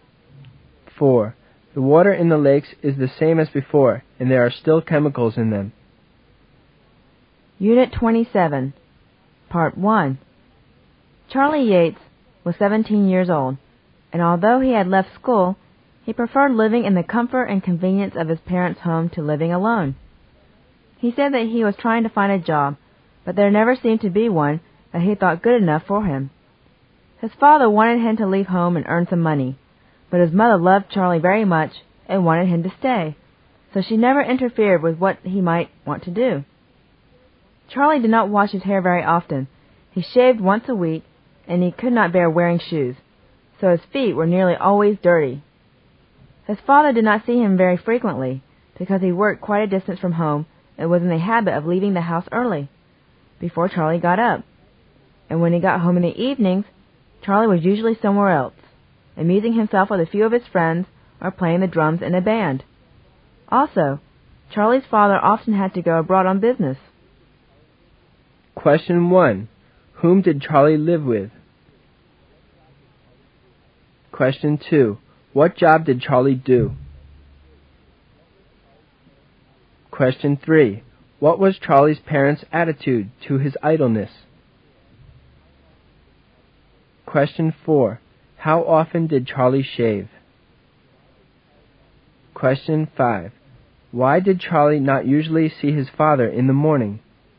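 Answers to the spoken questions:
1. His parents
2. None; he had no job
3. His father wanted him to leave home and earn money; his mother wanted him to stay and never interfered
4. Once a week
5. His father worked far away and left home early, before Charlie got up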